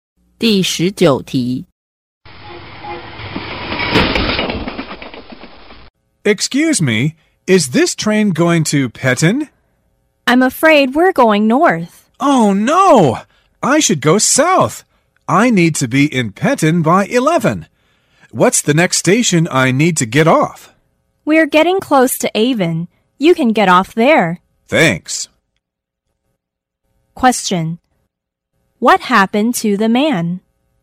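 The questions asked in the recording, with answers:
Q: What happened to the man?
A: He took the wrong train (going north)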